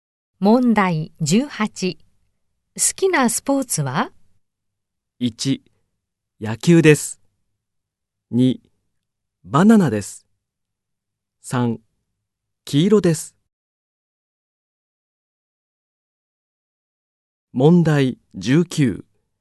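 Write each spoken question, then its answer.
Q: 好きなスポーツは?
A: 3: 野球です。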